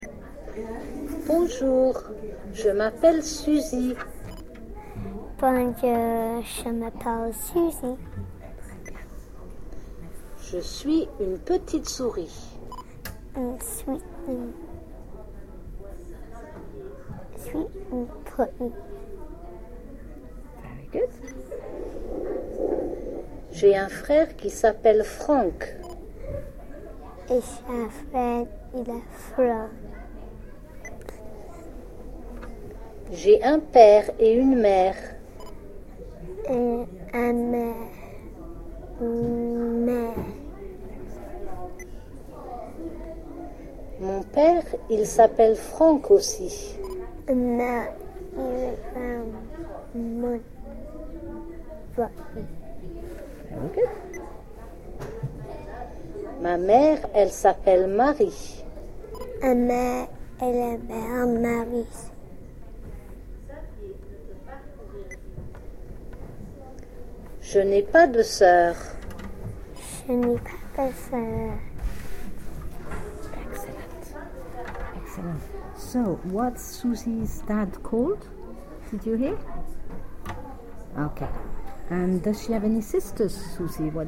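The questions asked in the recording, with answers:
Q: So, what's Susie's dad called?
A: Frank

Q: And does she have any sisters, Susie?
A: No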